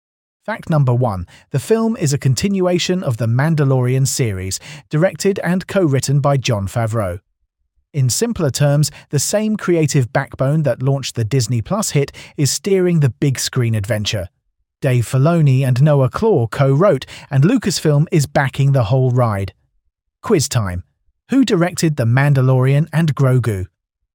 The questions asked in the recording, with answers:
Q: Who directed The Mandalorian and Grogu?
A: Correct answer, Jon Favreau.